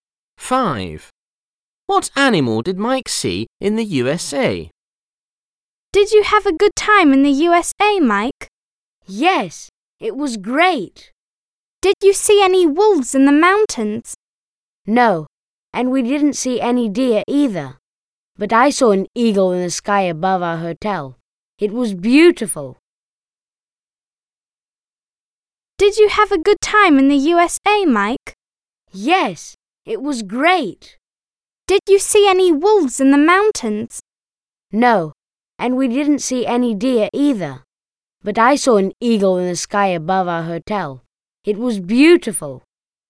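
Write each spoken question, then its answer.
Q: What animal did Mike see in the USA?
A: An eagle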